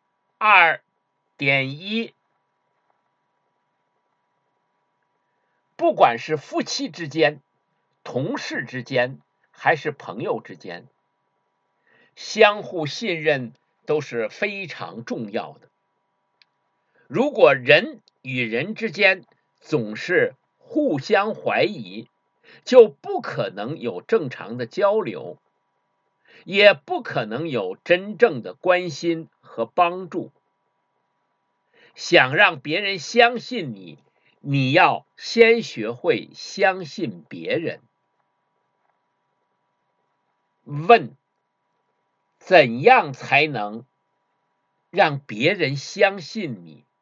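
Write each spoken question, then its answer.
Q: 问:怎样才能让别人相信你?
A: 要先学会相信别人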